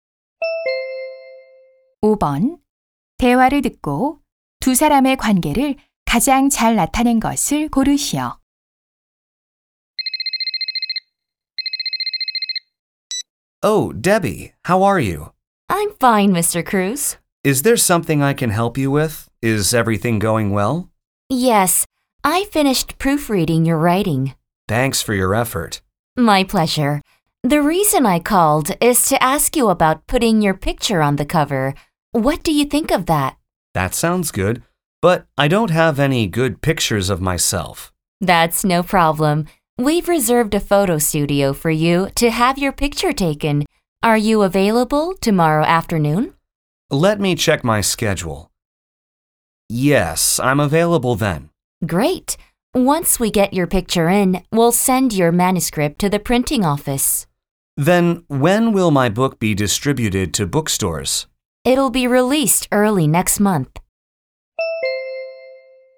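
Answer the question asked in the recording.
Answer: 작가 - 출판사 편집자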